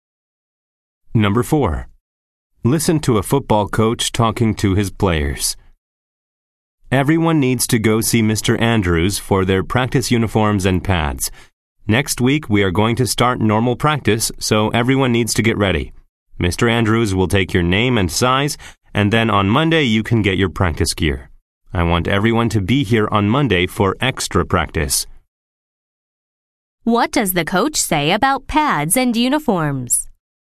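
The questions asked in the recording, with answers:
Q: What does the coach say about pads and uniforms?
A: Players should see Mr. Andrews, who will take their name and size; they get their practice gear on Monday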